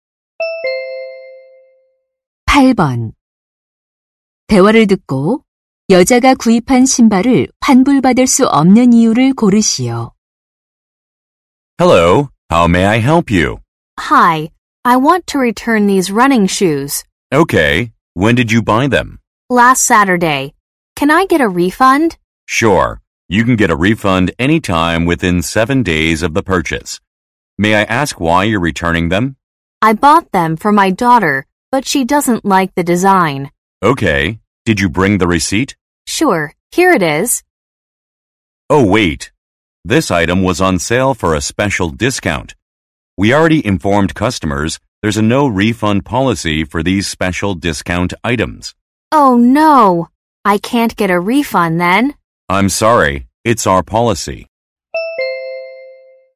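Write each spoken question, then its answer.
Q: 대화를 듣고 여자가 구입한 신발을 환불받을 수 없는 이유를 고르시오.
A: 특별 할인 상품이라 환불 불가 정책 때문에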